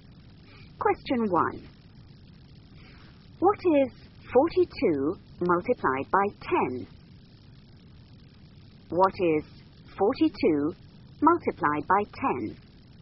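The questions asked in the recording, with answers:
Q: What is 42 multiplied by 10?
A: 420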